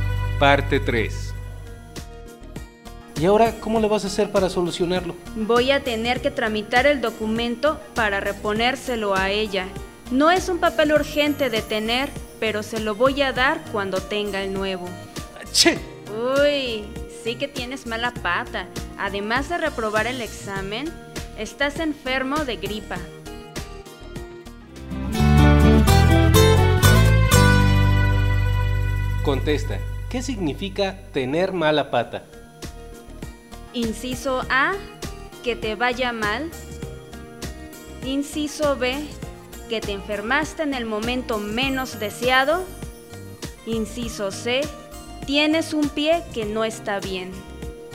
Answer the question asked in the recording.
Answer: Y la respuesta es el inciso A, que te vaya mal.